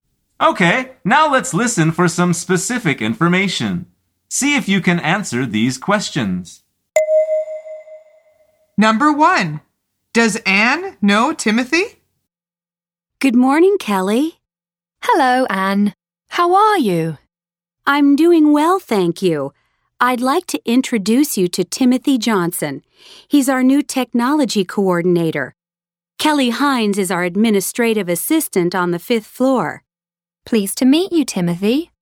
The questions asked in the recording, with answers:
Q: does Anne know Timothy?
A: The answer is yes. She is introducing him to Kelly.